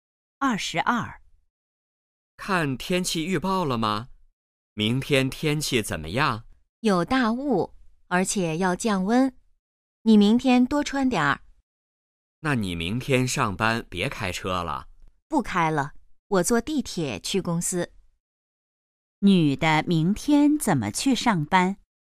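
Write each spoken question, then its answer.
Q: 女的明天怎么去上班?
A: 坐地铁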